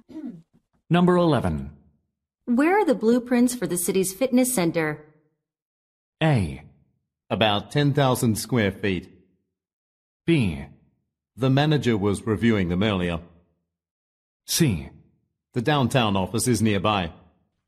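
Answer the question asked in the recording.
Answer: B: The manager was reviewing them earlier.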